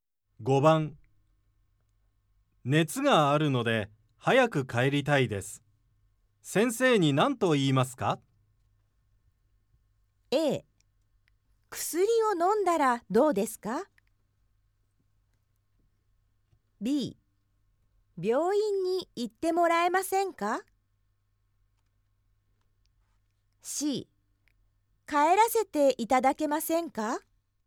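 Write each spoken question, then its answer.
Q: 熱があるので早く帰りたいです。先生に何と言いますか?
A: C: 帰らせていただけませんか?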